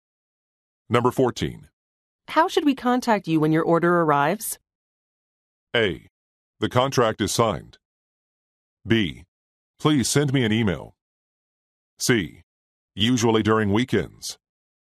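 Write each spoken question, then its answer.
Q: How should we contact you when your order arrives?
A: B: Please send me an email.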